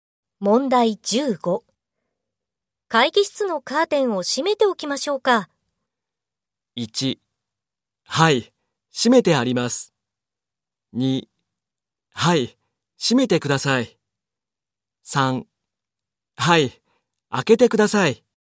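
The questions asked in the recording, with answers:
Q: 会議室のカーテンを閉めておきましょうか。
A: 3: はい、閉めてください。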